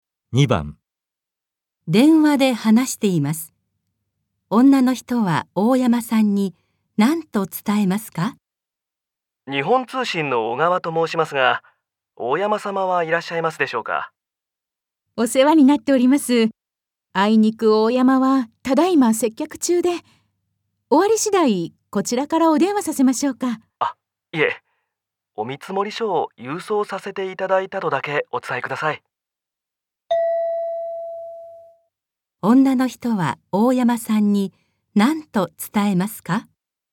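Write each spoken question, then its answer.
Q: 女の人は大山さんに何と伝えますか?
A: 日本通信の小川さんから見積書を郵送したこと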